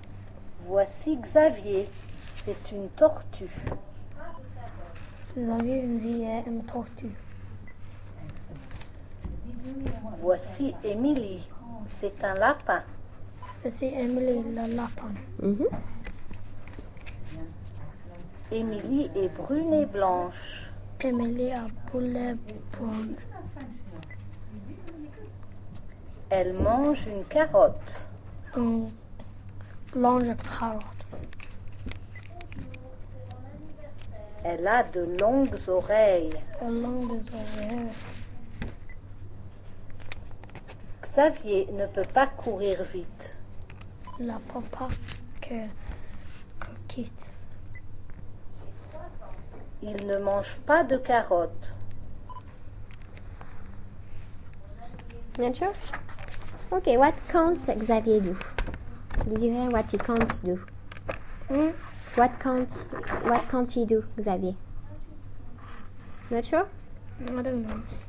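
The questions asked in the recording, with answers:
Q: Okay, what can't Xavier do?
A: Run fast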